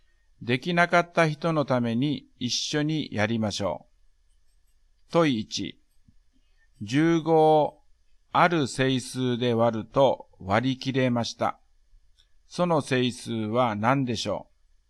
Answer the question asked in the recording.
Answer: だから、1か3か5か15です。